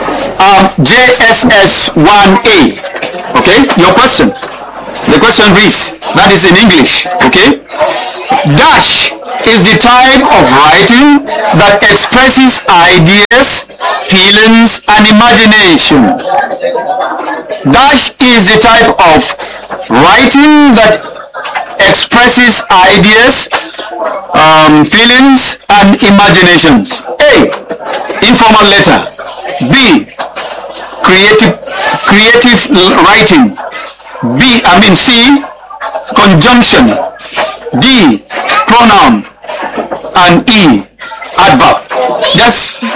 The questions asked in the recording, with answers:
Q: Dash is the type of writing that expresses ideas, feelings, and imagination.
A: Creative writing.